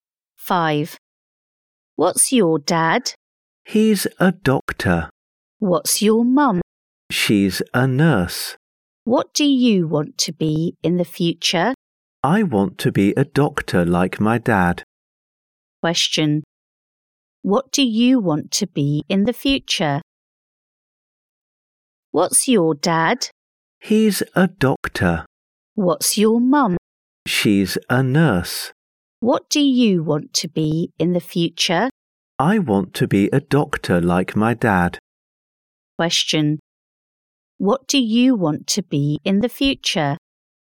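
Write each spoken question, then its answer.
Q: What do you want to be in the future?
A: A doctor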